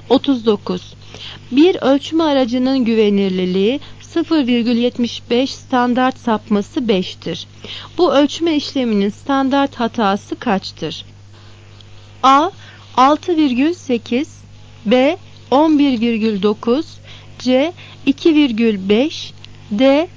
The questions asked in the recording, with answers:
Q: Bu ölçme işleminin standart hatası kaçtır?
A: Cevap C. 2,5.